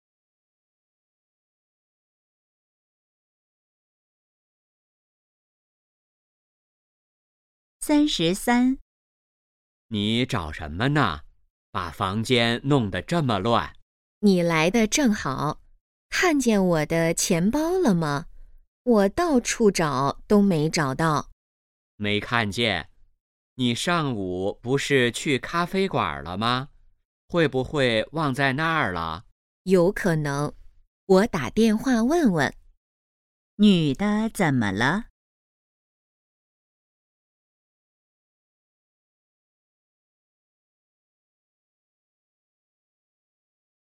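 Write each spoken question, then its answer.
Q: 女的怎么了?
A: 钱包找不到了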